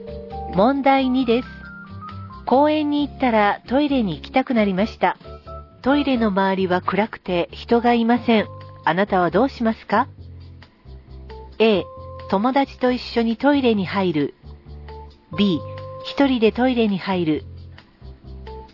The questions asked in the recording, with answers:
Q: あなたはどうしますか?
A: 正解は A. 友達と一緒にトイレに入るです。